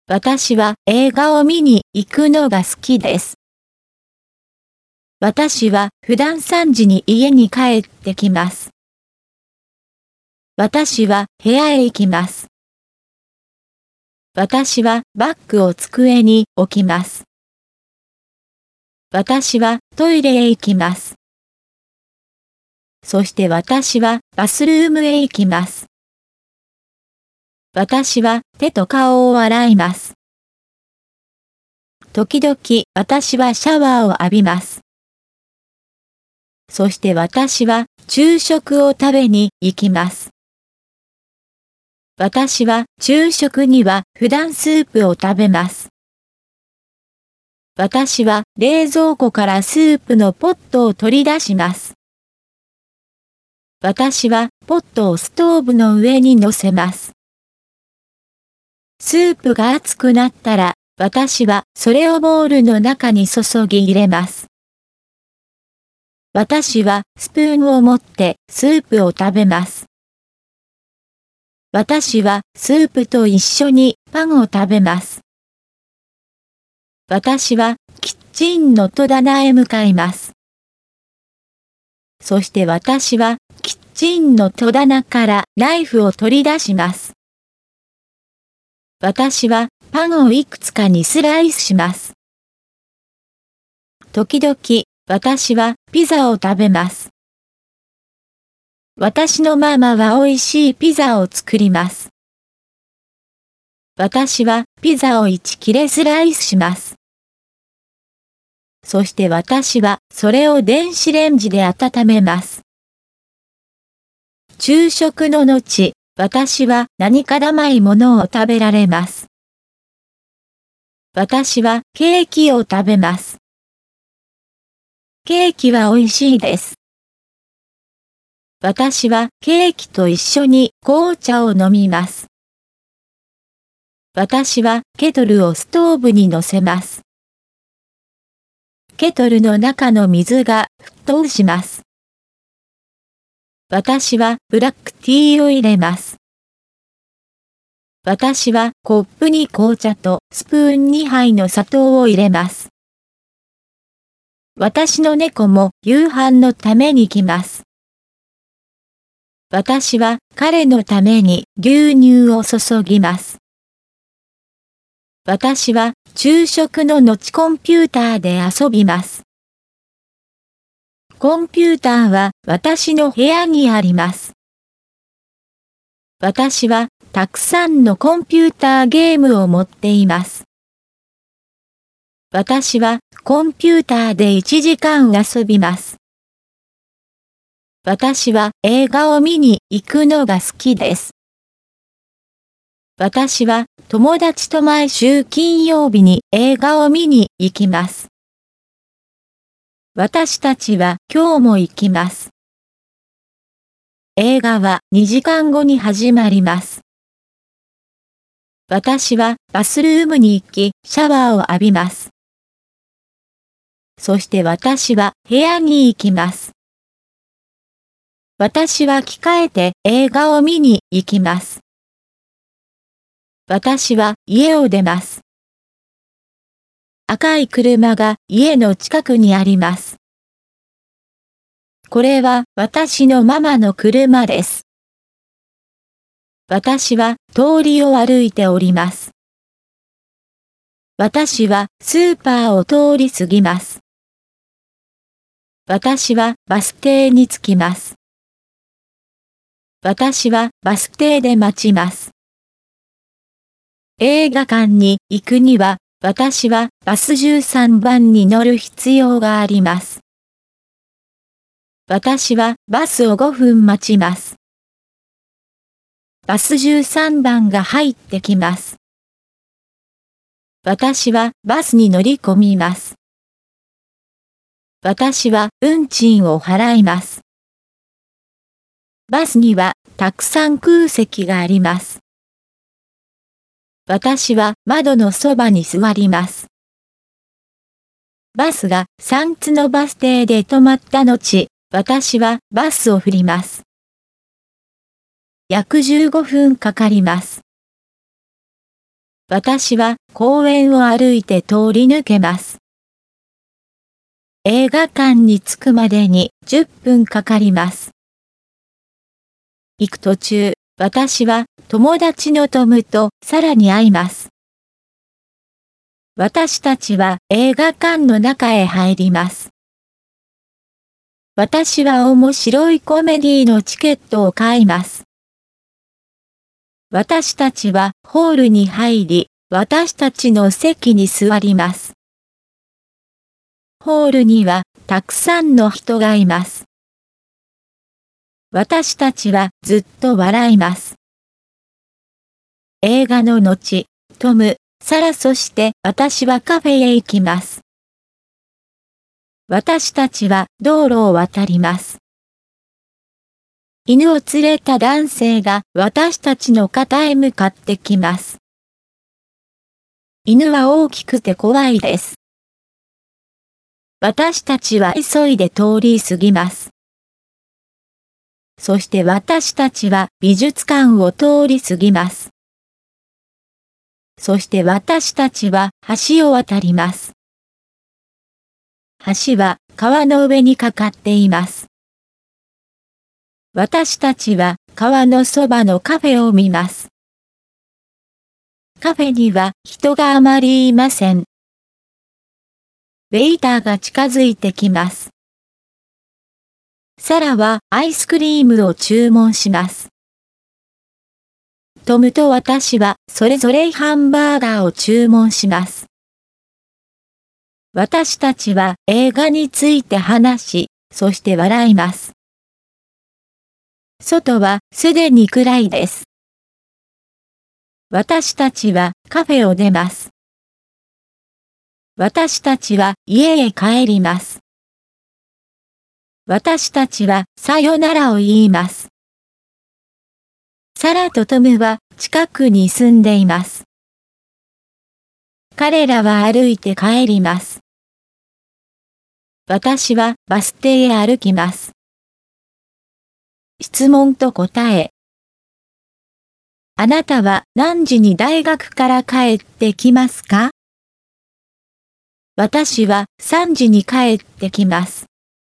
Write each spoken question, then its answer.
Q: あなたは何時に大学から帰ってきますか?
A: 私は3時に帰ってきます。